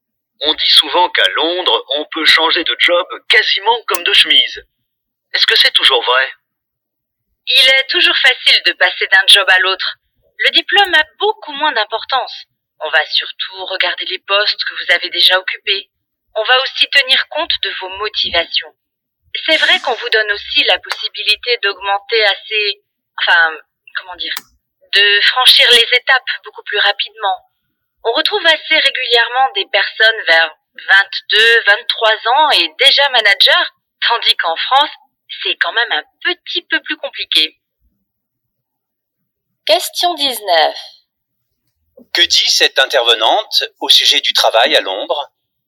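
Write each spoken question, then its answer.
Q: Que dit cette intervenante au sujet du travail à Londres ?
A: Il est facile de changer d'emploi, le diplôme compte moins que l'expérience, et on peut évoluer très vite.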